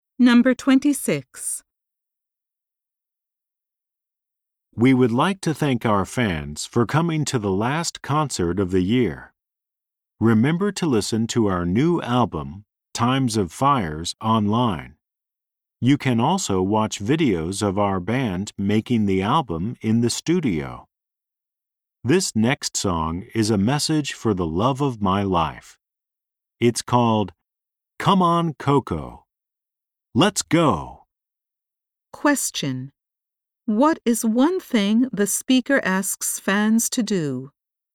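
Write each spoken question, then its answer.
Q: What is one thing the speaker asks fans to do?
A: Listen to their new album online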